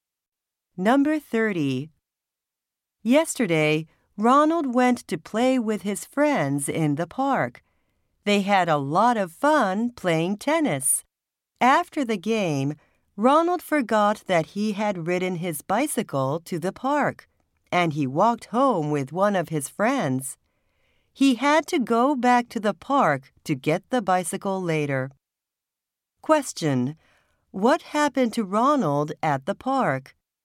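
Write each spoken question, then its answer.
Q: What happened to Ronald at the park?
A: He forgot his bicycle there.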